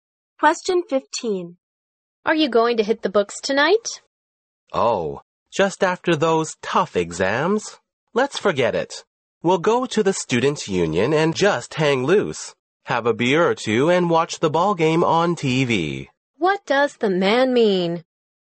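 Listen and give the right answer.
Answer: He will relax tonight instead of studying.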